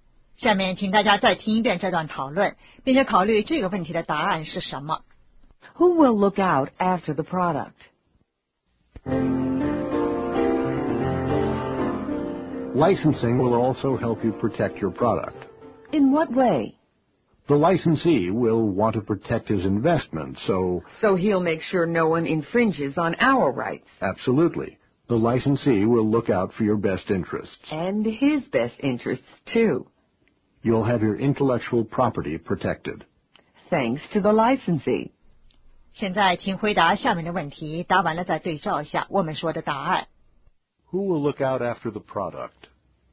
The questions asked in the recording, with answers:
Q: Who will look out after the product?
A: The licensee.